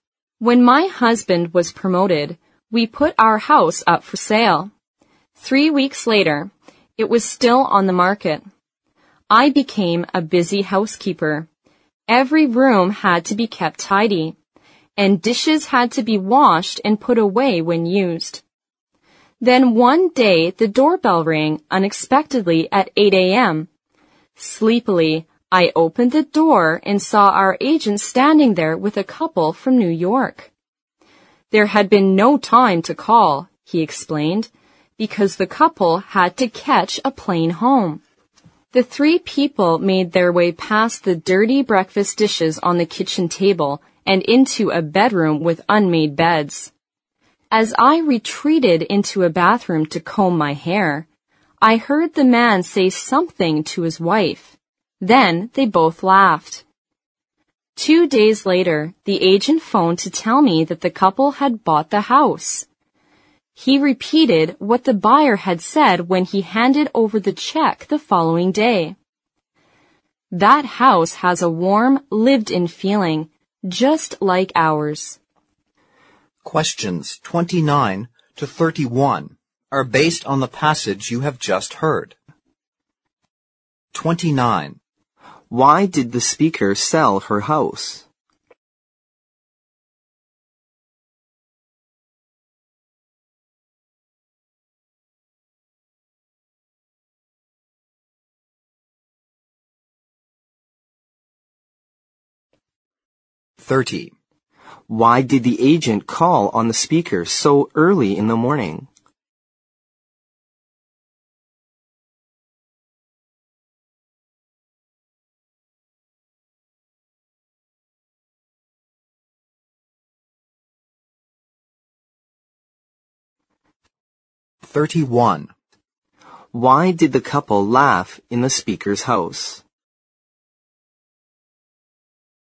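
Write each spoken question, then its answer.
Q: Why did the speaker sell her house?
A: Her husband was promoted.

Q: Why did the agent call on the speaker so early in the morning?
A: The couple had to catch a plane home.

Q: Why did the couple laugh in the speaker's house?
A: The messy house felt lived-in, just like their own.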